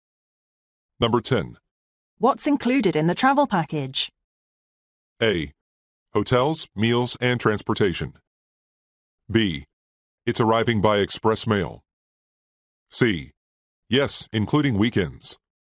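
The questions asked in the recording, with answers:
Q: What's included in the travel package?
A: A: Hotels, meals, and transportation.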